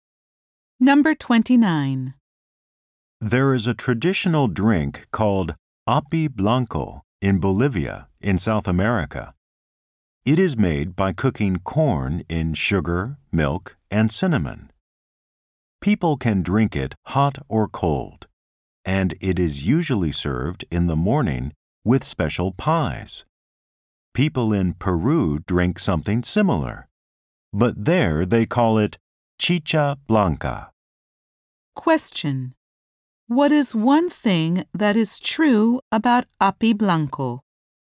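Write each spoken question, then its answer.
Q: What is one thing that is true about api blanco?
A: It is made by cooking corn in sugar, milk, and cinnamon.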